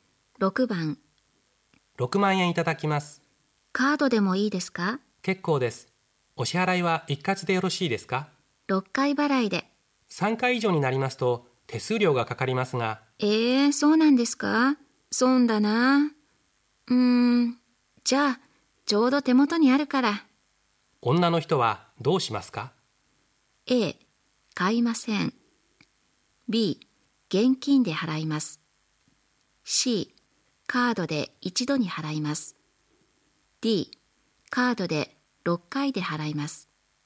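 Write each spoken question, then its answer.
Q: 女の人はどうしますか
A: B: 現金で払います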